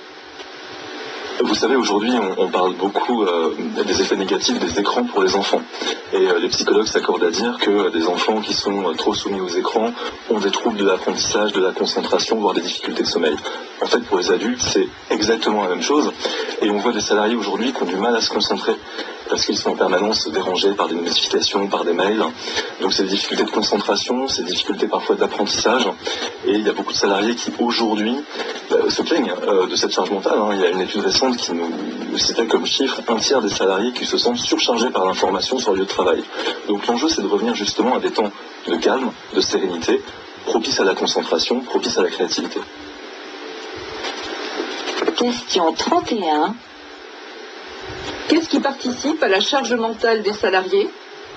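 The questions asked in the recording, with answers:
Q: Qu'est-ce qui participe à la charge mentale des salariés ?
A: Les notifications et les mails qui les dérangent en permanence (surcharge d'information)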